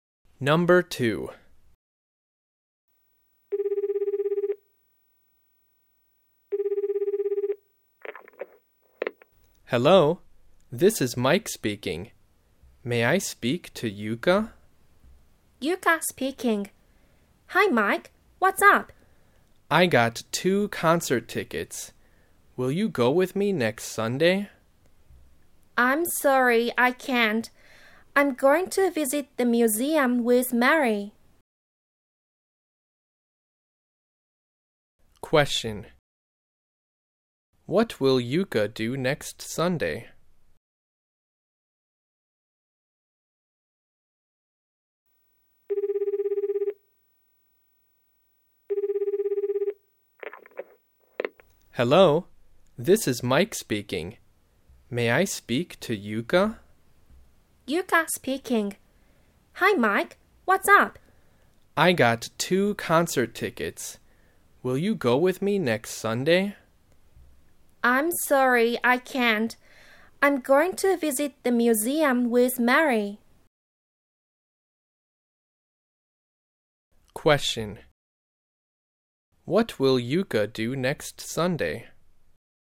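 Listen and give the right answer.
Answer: Visit the museum with Mary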